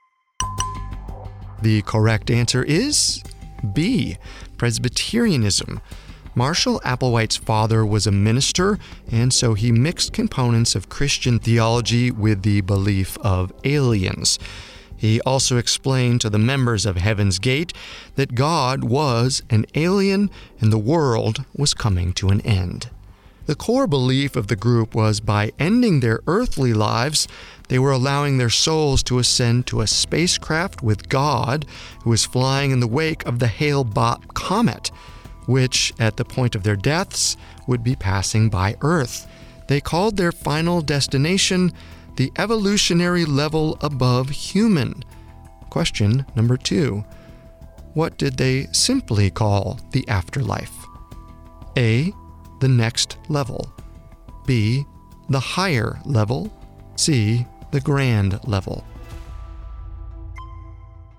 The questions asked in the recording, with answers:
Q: What did they simply call the afterlife?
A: They called the afterlife A, the next level.